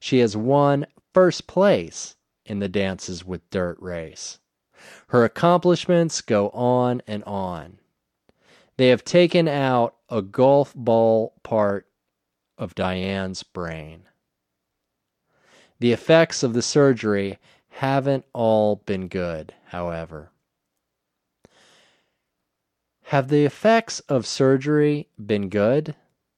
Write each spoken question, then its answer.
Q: Have the effects of surgery been good?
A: No, they haven't all been good.